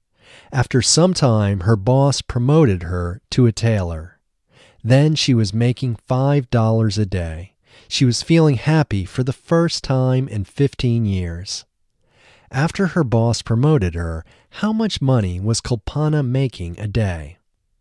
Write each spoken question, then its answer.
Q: After her boss promoted her, how much money was Kulpana making a day?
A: After her boss promoted her, she was making $5 a day.